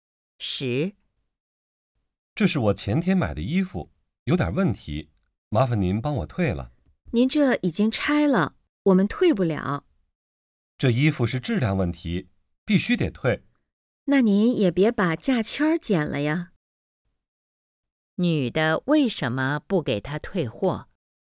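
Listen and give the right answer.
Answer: 价签已经剪了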